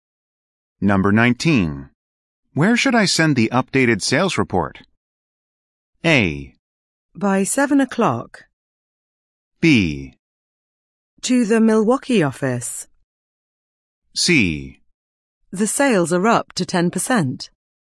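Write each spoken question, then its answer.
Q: Where should I send the updated sales report?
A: B: To the Milwaukee office.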